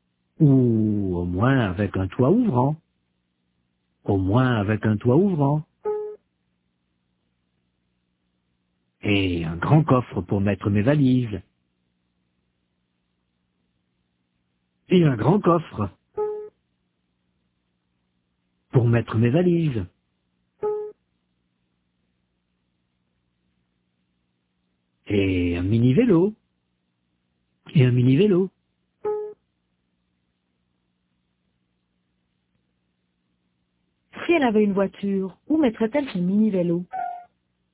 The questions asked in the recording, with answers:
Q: Si elle avait une voiture, où mettrait-elle son mini-vélo?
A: Dans le coffre.